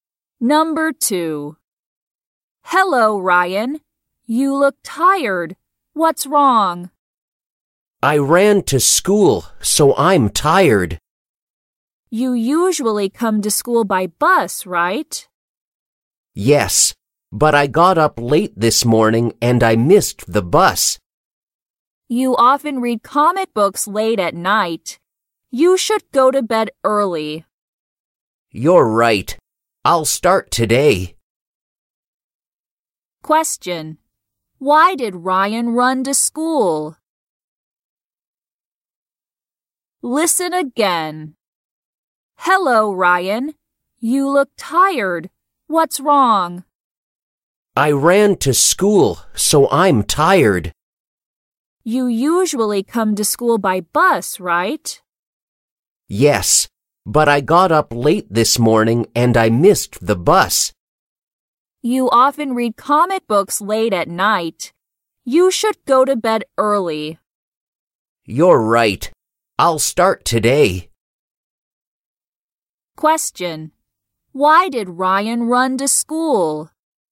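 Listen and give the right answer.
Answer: Because he got up late and missed the bus.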